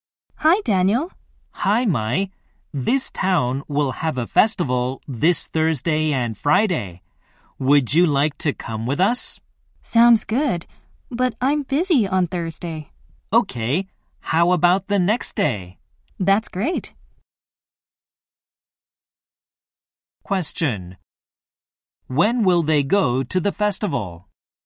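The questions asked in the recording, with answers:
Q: When will they go to the festival?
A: On Friday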